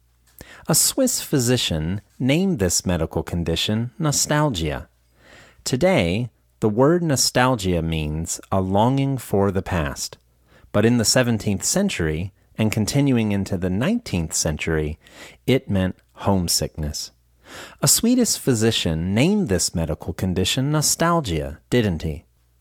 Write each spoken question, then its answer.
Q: A Swedish physician named this medical condition nostalgia, didn't he?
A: No, he didn't. It was a Swiss physician, not a Swedish physician.